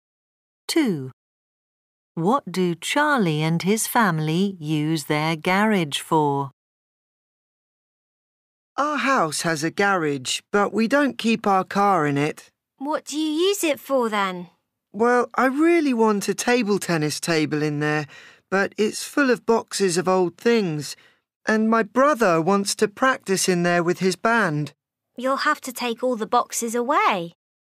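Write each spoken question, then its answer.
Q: What do Charlie and his family use their garage for?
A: Keeping boxes of old things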